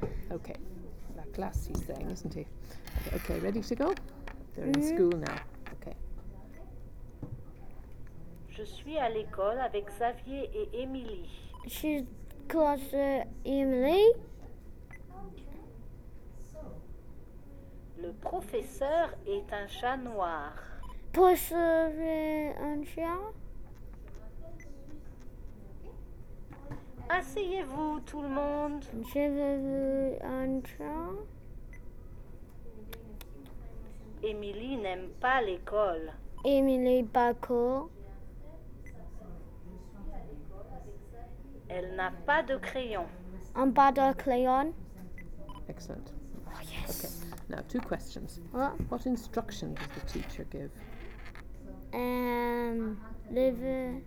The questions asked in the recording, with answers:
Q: What instruction does the teacher give?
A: No, actually he said, asseyez-vous.